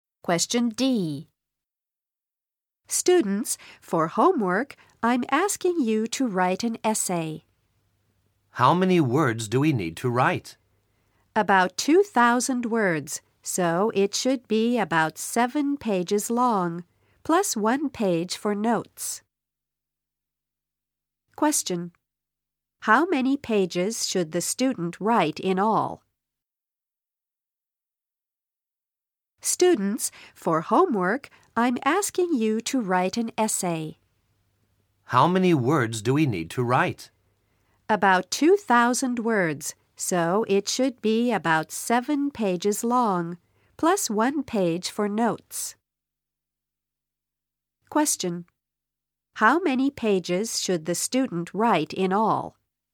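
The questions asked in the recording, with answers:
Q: How many pages should the student write in all?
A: 8 pages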